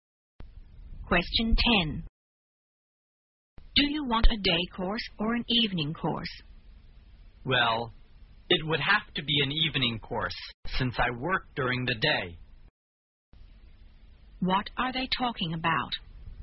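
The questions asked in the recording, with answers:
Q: What are they talking about?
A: Whether to take a day course or an evening course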